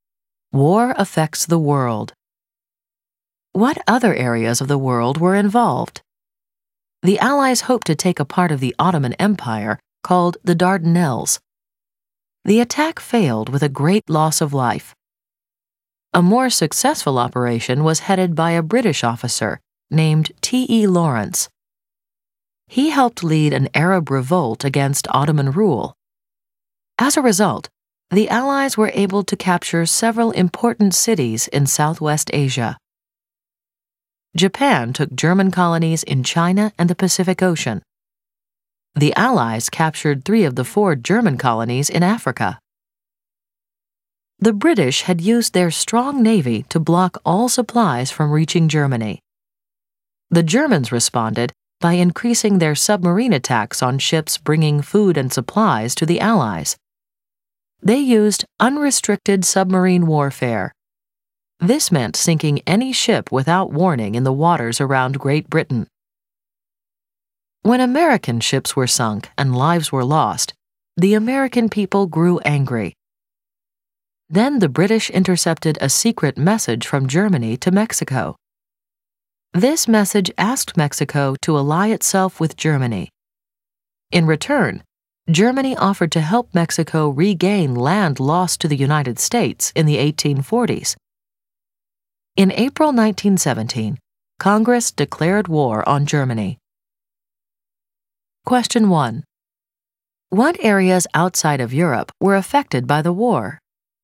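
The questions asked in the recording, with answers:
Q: What areas outside of Europe were affected by the war?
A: Southwest Asia (Ottoman Empire), China and the Pacific, Africa, and the United States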